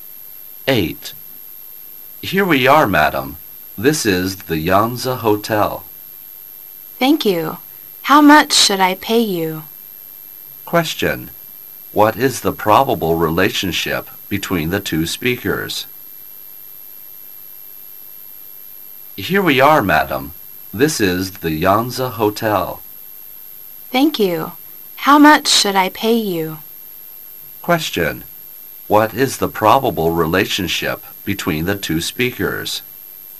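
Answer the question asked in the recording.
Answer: Taxi driver and passenger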